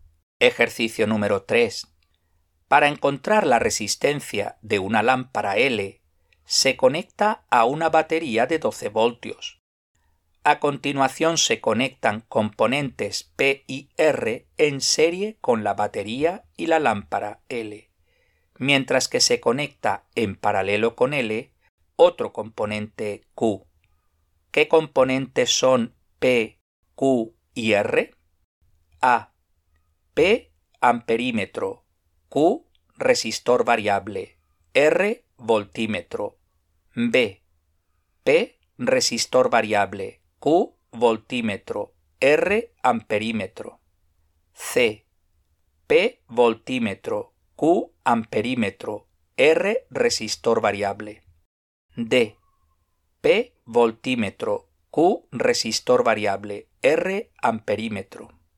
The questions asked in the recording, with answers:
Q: ¿Qué componentes son P, Q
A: La respuesta correcta es la B.